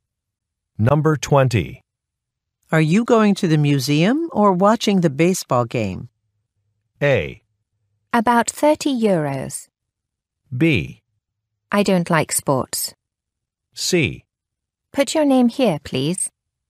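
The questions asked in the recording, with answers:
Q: Are you going to the museum or watching the baseball game?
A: B: I don't like sports.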